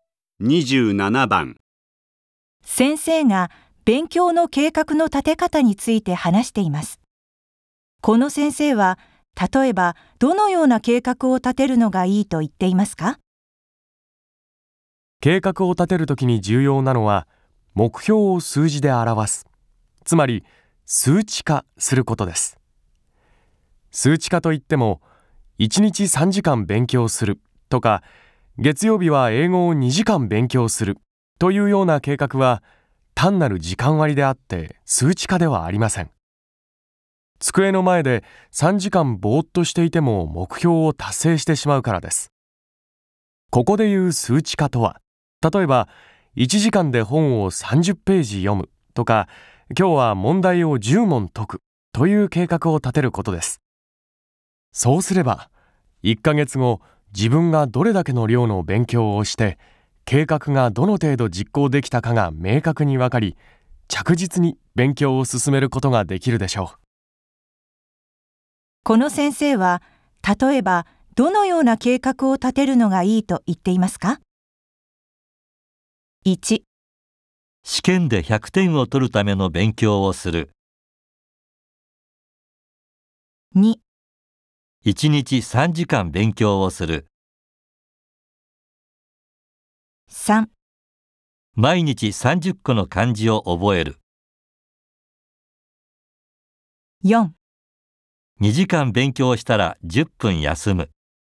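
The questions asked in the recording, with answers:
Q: この先生は、例えばどのような計画を立てるのがいいと言っていますか?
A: 3: 毎日30個の漢字を覚える。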